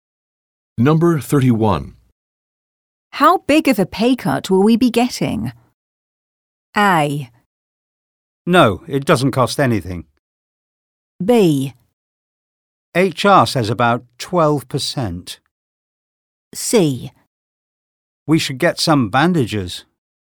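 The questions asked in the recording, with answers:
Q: How big of a pay cut will we be getting?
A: B: HR says about 12%.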